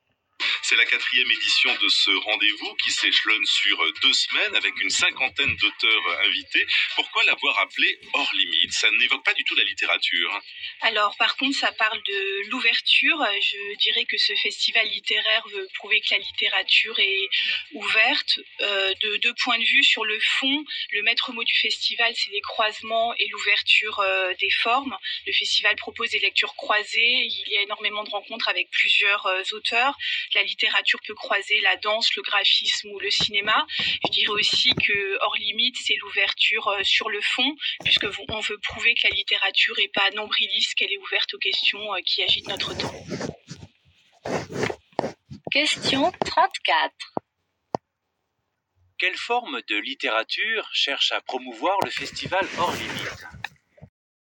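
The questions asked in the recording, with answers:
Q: Quelle forme de littérature cherche à promouvoir le festival Hors Limite ?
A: Une littérature ouverte, qui croise d'autres formes (danse, graphisme, cinéma) et s'ouvre aux questions de notre temps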